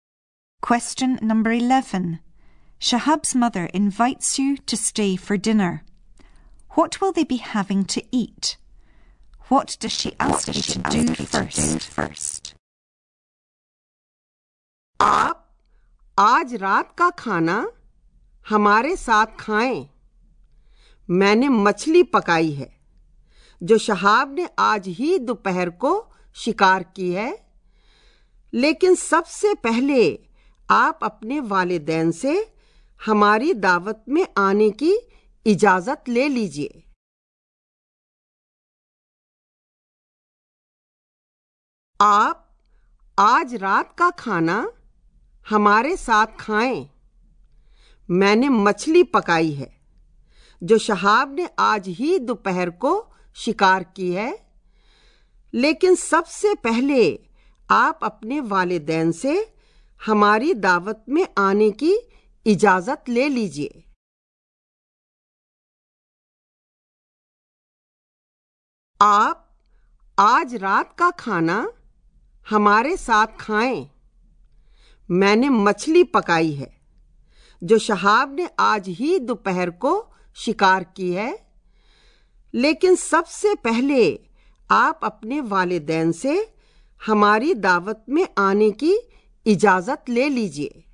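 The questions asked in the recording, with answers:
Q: What will they be having to eat?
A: Fish that Shahab caught this afternoon

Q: What does she ask you to do first?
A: Ask your parents' permission to come to dinner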